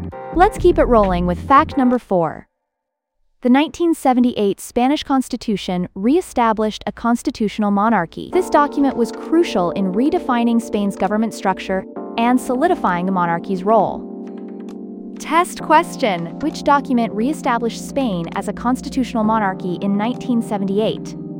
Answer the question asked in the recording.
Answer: Spanish Constitution.